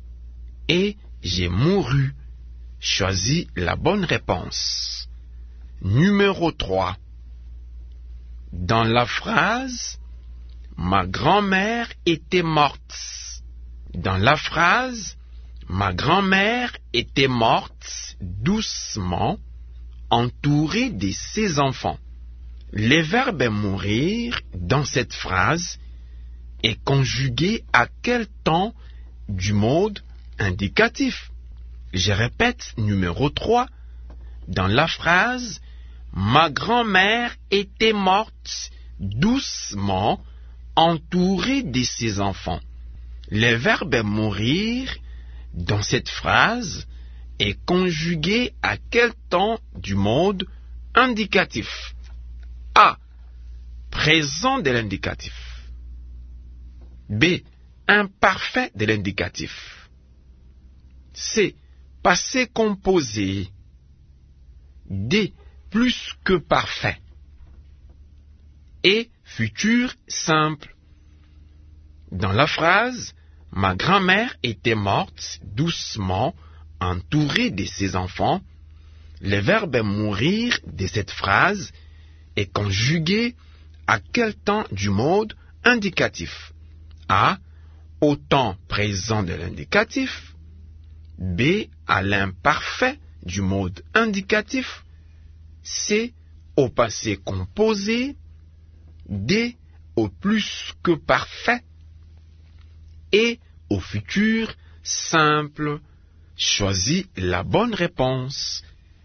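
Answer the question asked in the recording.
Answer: D: Plus que parfait.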